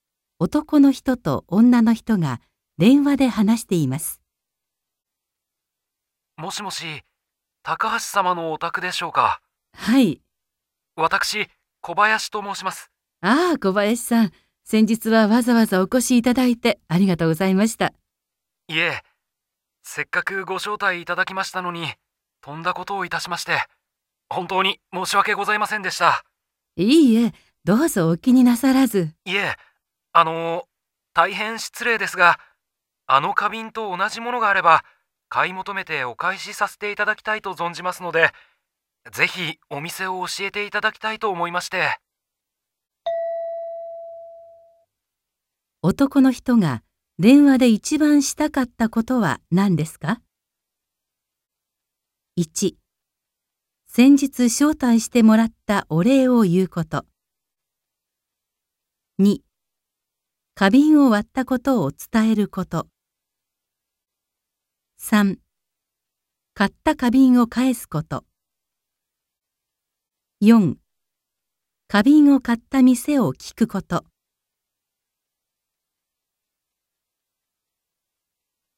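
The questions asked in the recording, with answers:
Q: 男の人が電話で一番したかったことは何ですか?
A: 4: 花瓶を買った店を聞くこと。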